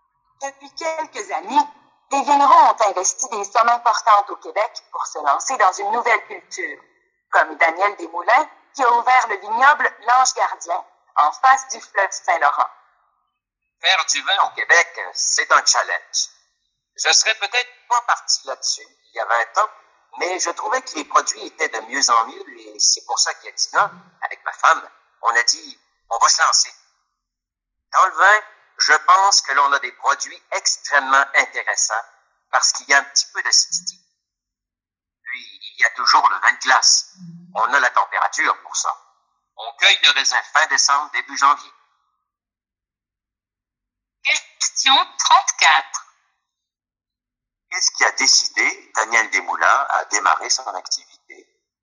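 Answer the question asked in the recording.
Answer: La qualité des vins québécois, qui s'améliorait de plus en plus.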